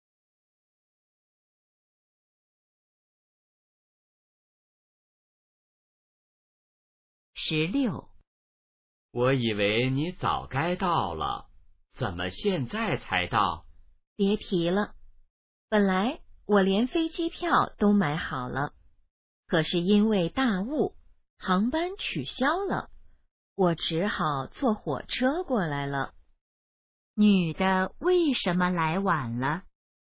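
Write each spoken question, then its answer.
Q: 女的为什么来晚了?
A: 因为大雾航班取消,只好坐火车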